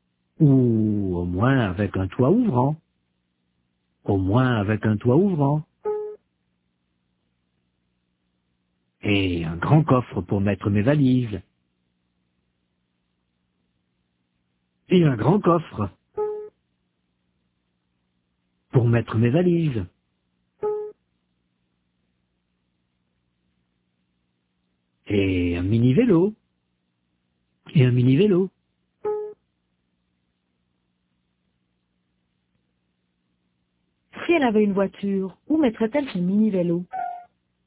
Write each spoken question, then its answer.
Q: Si elle avait une voiture, où mettrait-elle son mini-vélo?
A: Dans le coffre.